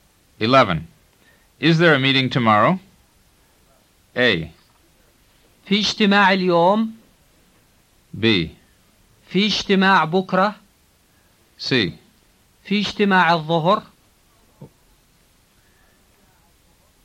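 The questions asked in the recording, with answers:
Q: Is there a meeting tomorrow?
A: B: في اجتماع بكرة.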